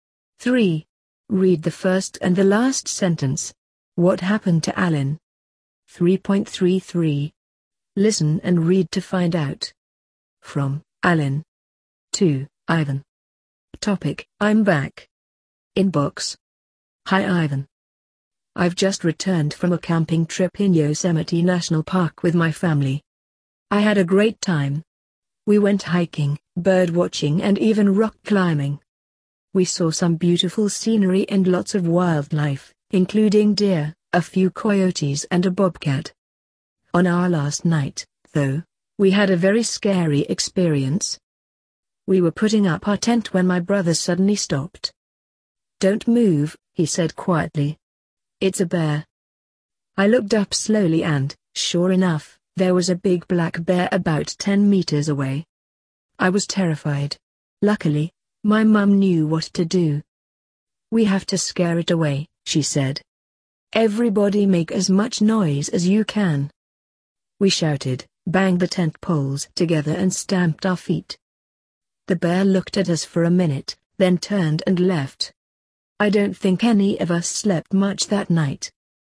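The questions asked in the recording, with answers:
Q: What happened to Alan?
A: While camping in Yosemite, his family met a big black bear and scared it away by making noise.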